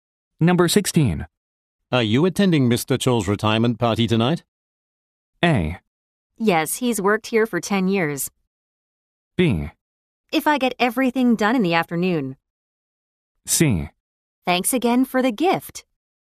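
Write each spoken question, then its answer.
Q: Are you attending Mr. Chol's retirement party tonight?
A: B: If I get everything done in the afternoon.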